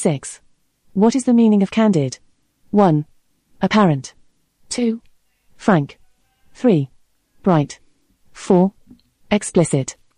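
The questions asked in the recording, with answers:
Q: What is the meaning of candid?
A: 2: Frank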